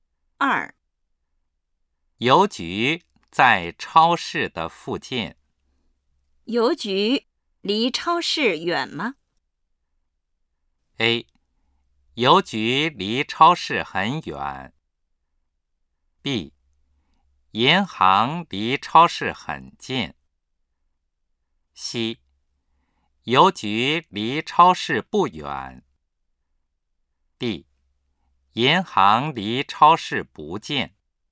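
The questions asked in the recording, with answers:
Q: 邮局离超市远吗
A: C: 邮局离超市不远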